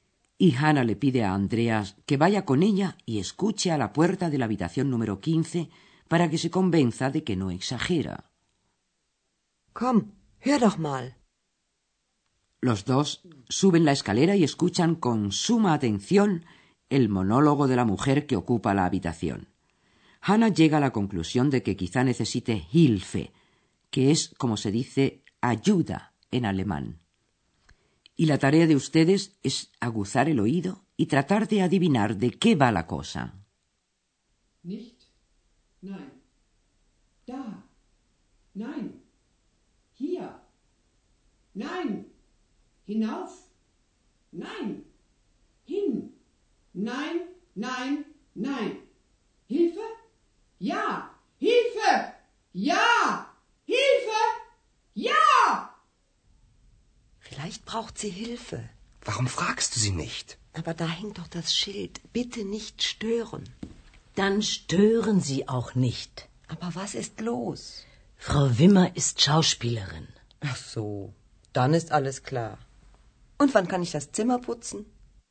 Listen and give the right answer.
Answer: La señora Wimmer, la ocupante de la habitación, es actriz y está ensayando un papel.